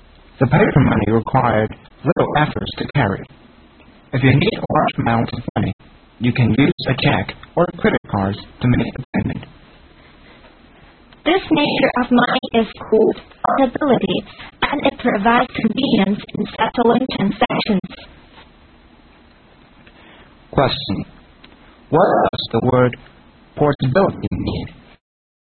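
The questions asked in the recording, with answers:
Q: What does the word portability mean?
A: Money is easy to carry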